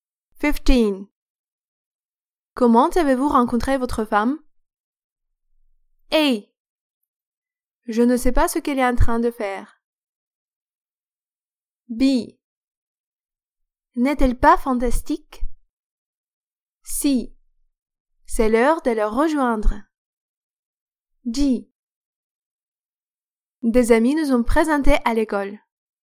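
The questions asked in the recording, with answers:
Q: Comment avez-vous rencontré votre femme?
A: D: Des amis nous ont présentés à l'école.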